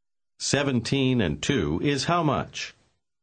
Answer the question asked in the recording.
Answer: 19.